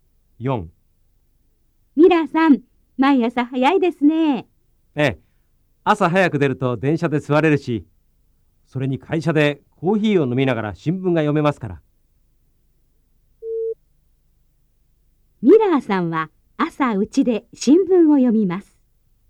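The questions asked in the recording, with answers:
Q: ミラーさんは朝うちで新聞を読みます。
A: ×(会社で読みます)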